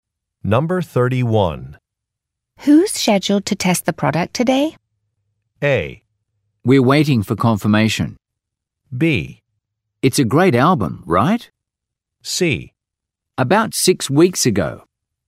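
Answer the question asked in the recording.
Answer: A: We're waiting for confirmation.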